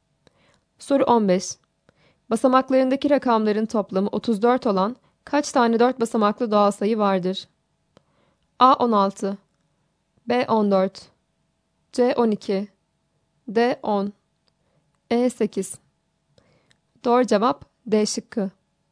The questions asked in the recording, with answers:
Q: Basamaklarındaki rakamların toplamı 34 olan kaç tane 4 basamaklı doğal sayı vardır?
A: Doğru cevap D şıkkı.